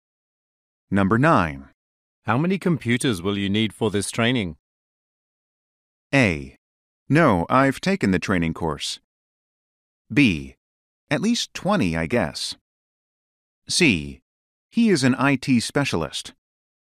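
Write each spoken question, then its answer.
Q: How many computers will you need for this training?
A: B: At least 20, I guess.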